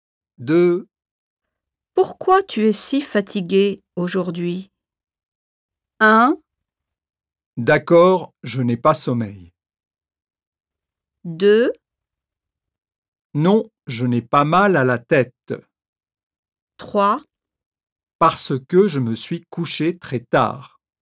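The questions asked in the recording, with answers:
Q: Pourquoi tu es si fatigué aujourd'hui?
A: 3: Parce que je me suis couché très tard.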